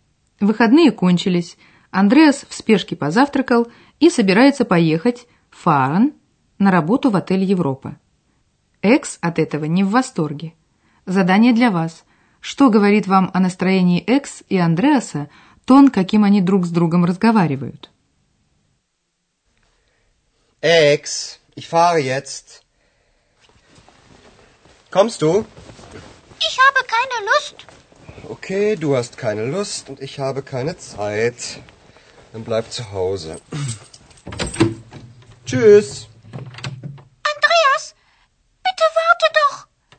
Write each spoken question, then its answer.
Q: Что говорит вам о настроении Экс и Андреаса тон, каким они друг с другом разговаривают?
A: Вы заметили, что у Экс нет настроения, а Андреас раздражен.